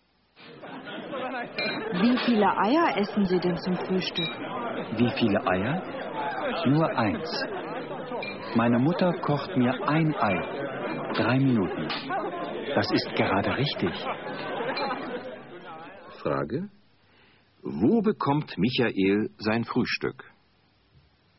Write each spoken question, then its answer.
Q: Wo bekommt Michael sein Frühstück?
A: Er bekommt es zu Hause.